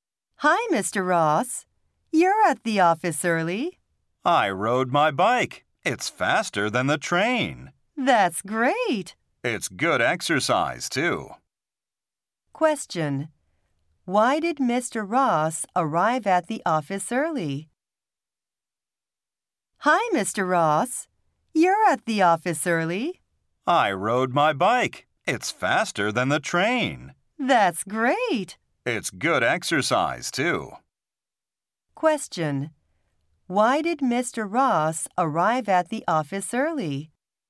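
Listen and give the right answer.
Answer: He rode his bike.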